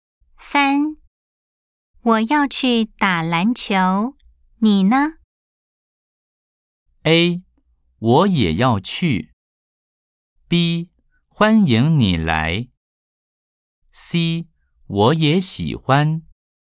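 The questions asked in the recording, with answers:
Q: 我要去打篮球,你呢?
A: A: 我也要去。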